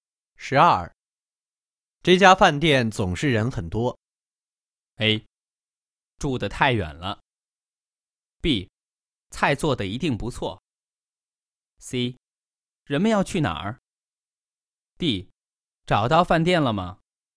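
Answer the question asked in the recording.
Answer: B: 菜做得一定不错。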